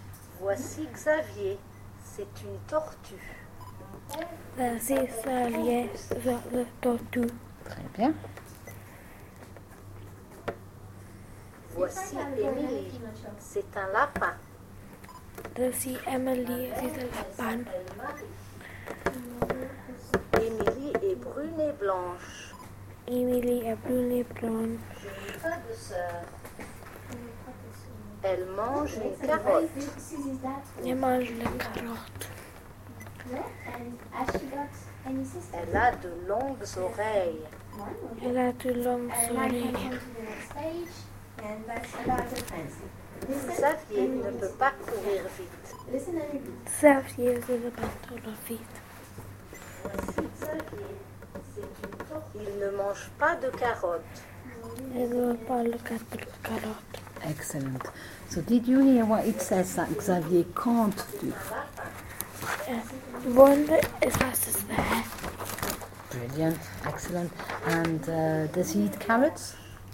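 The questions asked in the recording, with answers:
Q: So did you hear what it says that Xavier can't do?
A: Run fast

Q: And does he eat carrots?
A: No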